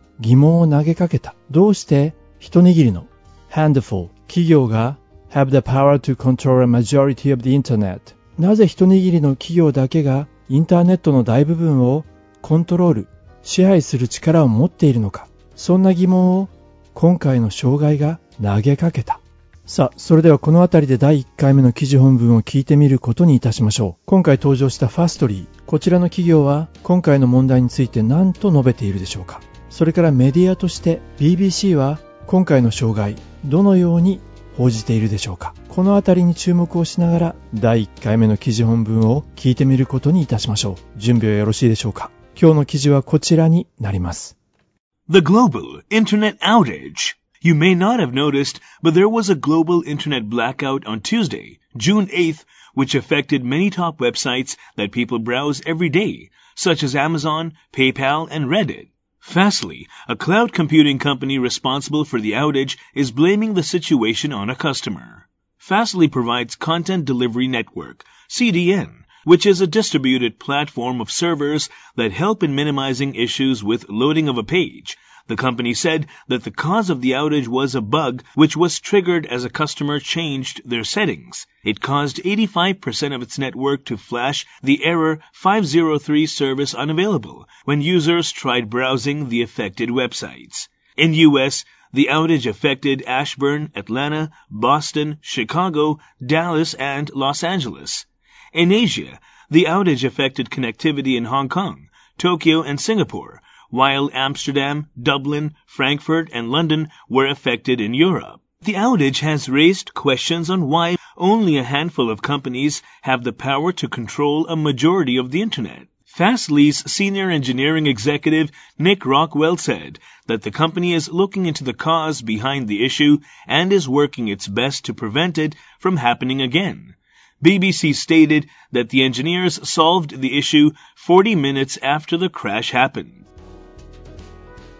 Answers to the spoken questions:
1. Fastly's senior engineering executive Nick Rockwell said that the company is looking into the cause behind the issue and is working its best to prevent it from happening again.
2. クラッシュが起こってから40分後に問題を解決したと BBC は伝えたんですね。